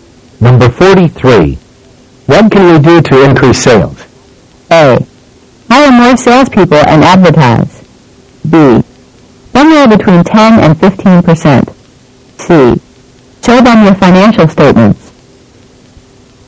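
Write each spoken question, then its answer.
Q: What can we do to increase sales?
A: A: Hire more salespeople and advertise.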